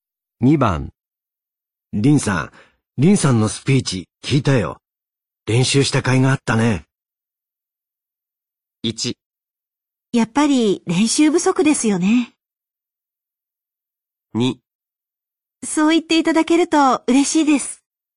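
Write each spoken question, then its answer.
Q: リンさん、リンさんのスピーチ聞いたよ。練習した甲斐があったね。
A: 2: そう言っていただけると嬉しいです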